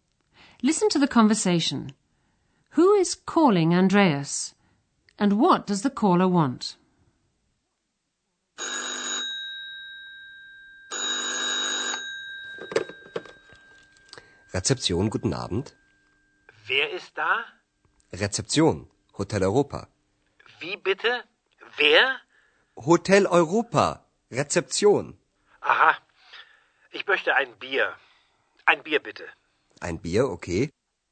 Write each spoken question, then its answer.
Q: And what does the caller want?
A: The caller asks Andreas for a beer.